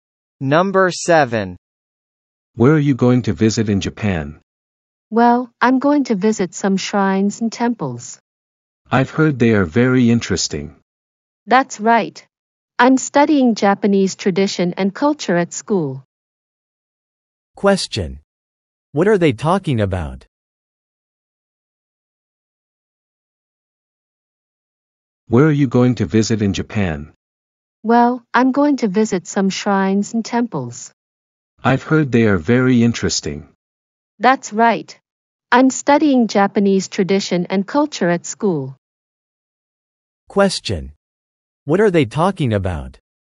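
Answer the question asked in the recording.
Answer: Places to visit in Japan, such as shrines and temples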